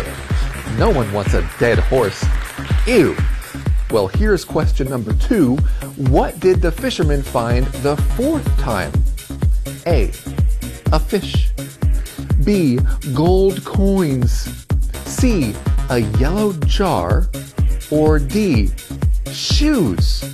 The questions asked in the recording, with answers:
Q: What did the fisherman find the fourth time?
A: The correct answer is C. A yellow jar.